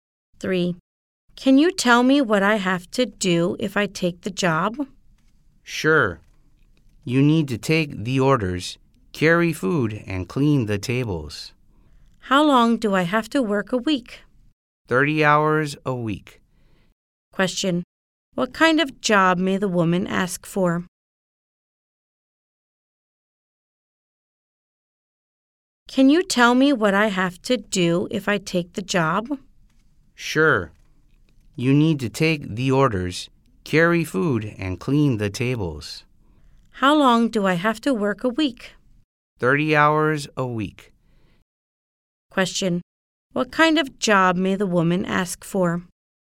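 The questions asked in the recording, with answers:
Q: What kind of job may the woman ask for?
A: A waitress job in a restaurant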